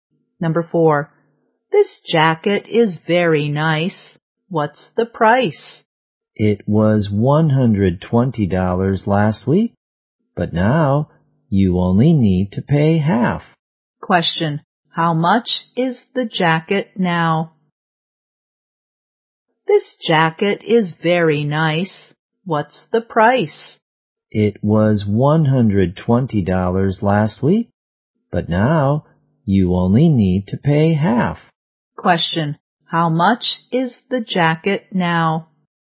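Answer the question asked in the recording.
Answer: $60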